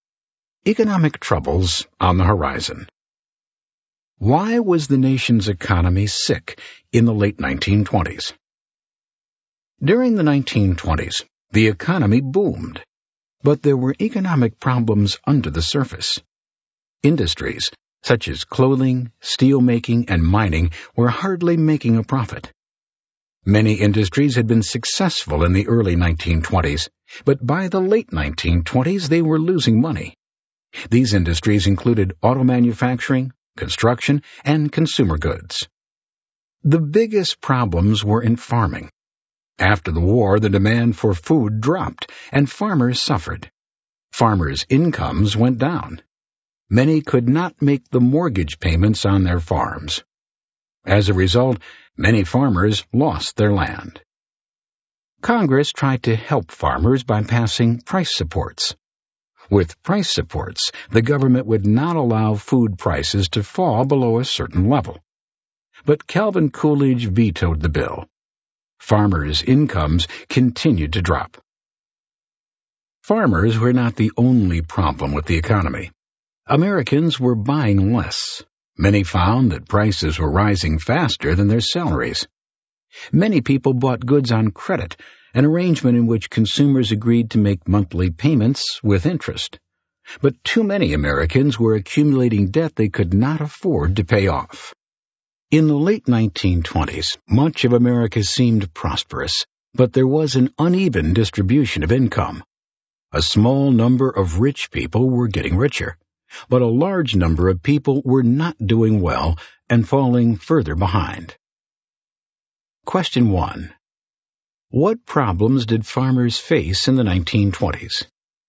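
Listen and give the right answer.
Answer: Demand for food dropped, incomes fell, many couldn't pay mortgages and lost their land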